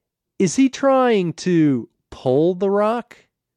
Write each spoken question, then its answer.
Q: Is he trying to pull the rock?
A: Yes, he's trying to pull the rock.